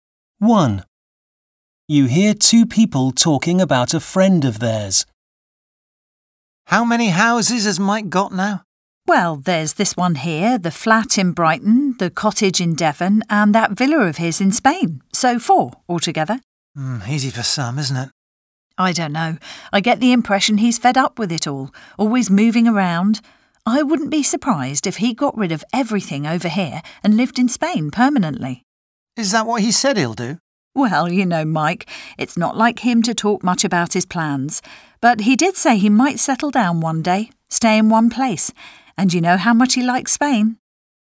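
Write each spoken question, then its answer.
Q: How many houses has Mike got now?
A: Four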